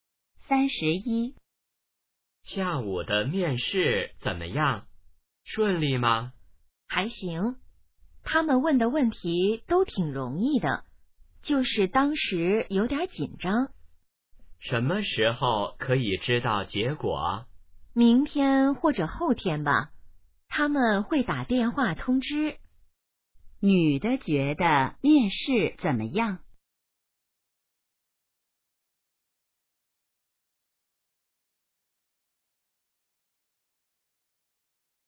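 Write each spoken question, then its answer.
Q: 女的觉得面试怎么样?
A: 问题挺容易,但有点紧张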